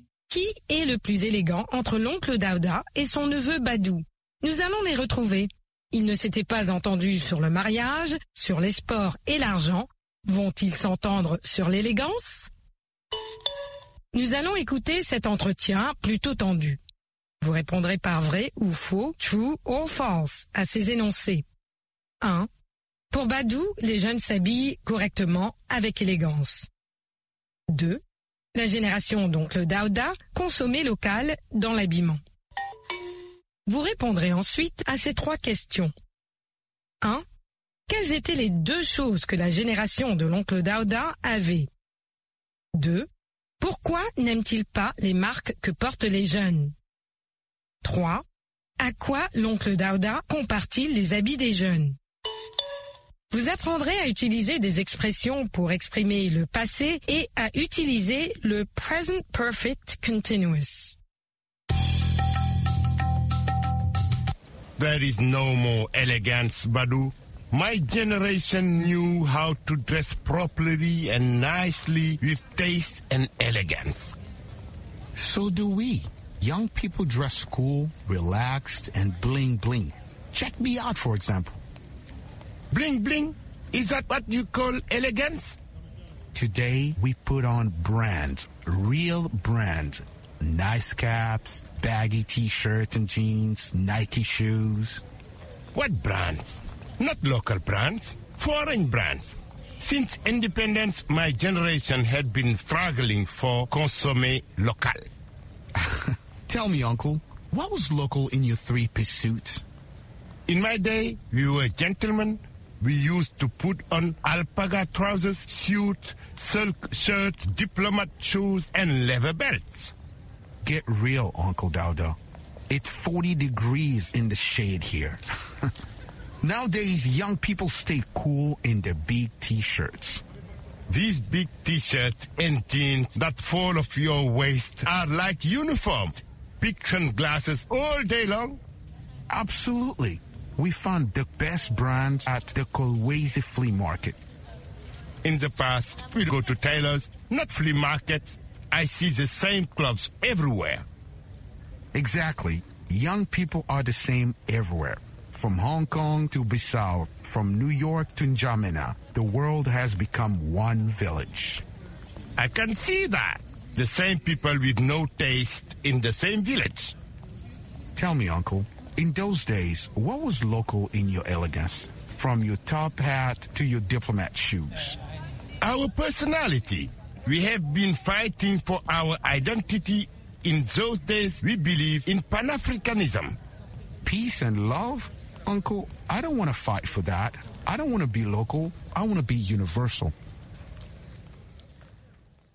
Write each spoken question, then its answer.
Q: Pour Badou, les jeunes s'habillent correctement avec élégance.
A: L'énoncé 1 est vrai.

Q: La génération d'oncle Daouda consommait local dans l'habillement.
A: L'énoncé 2 est faux.

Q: Quelles étaient les deux choses que la génération de l'oncle Daouda avait?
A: Le goût et l'élégance.

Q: Pourquoi n'aime-t-il pas les marques que portent les jeunes?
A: Parce qu'elles sont étrangères.

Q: À quoi l'oncle Daouda compare-t-il les habits des jeunes?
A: À des uniformes.